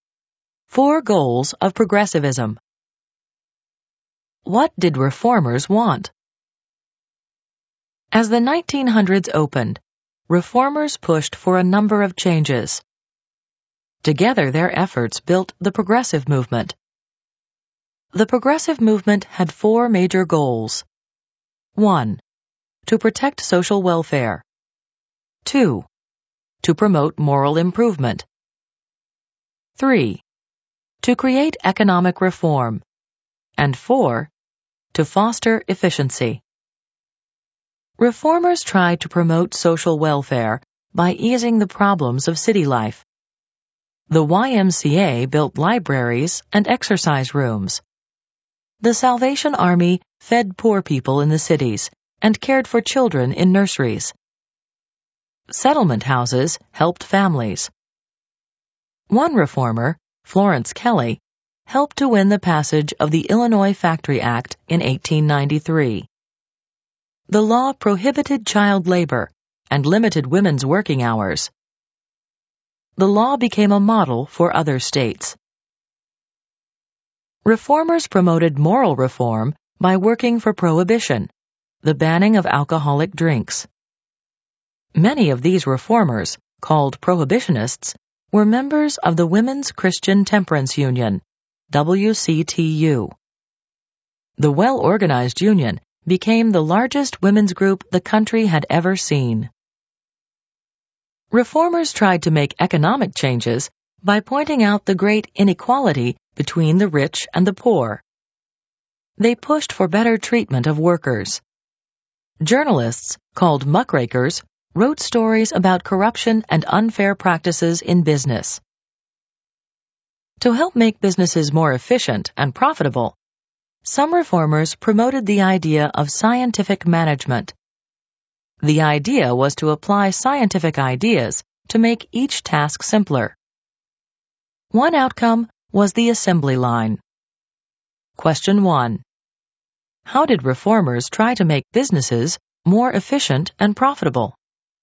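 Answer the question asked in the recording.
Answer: By promoting scientific management, applying scientific ideas to make each task simpler, which led to the assembly line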